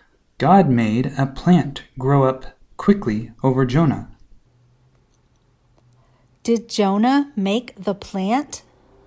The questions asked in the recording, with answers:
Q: Did Jonah make the plant?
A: No, God made the plant.